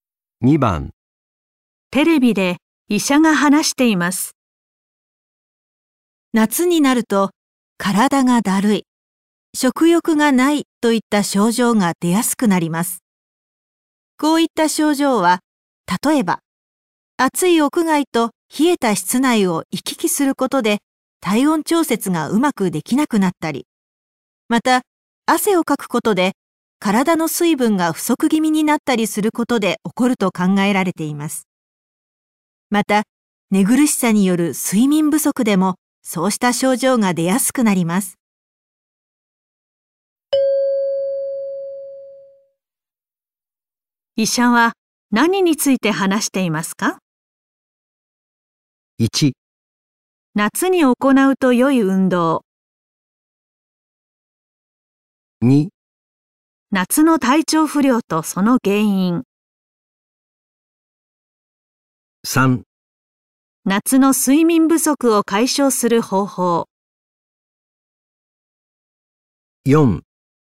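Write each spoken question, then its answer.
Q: 医者は何について話していますか?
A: 2: 夏の体調不良とその原因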